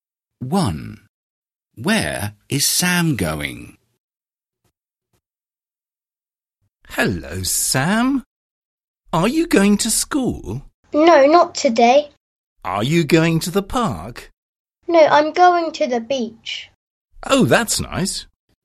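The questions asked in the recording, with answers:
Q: Where is Sam going?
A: to the beach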